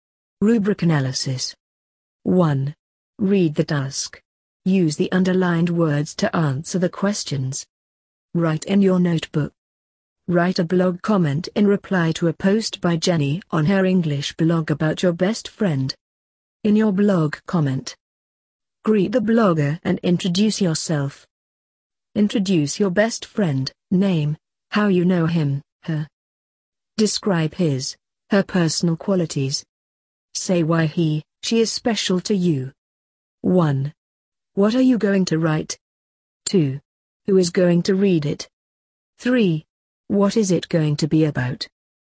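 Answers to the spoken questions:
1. A blog comment
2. Jenny, the blogger
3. Your best friend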